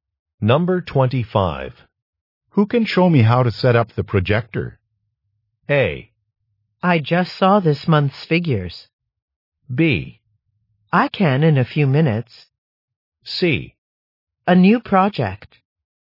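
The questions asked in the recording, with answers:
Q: Who can show me how to set up the projector?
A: B: I can in a few minutes.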